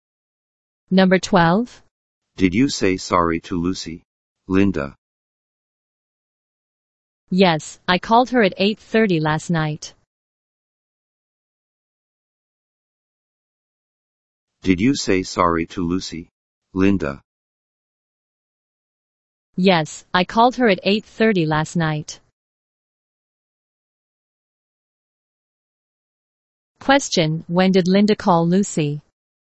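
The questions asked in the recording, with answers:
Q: Question, when did Linda call Lucy?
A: At 8:30 last night.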